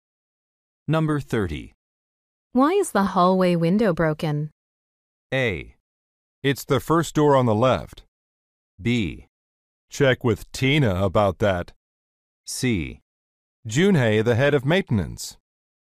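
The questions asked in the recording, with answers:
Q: Why is the hallway window broken?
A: B: Check with Tina about that.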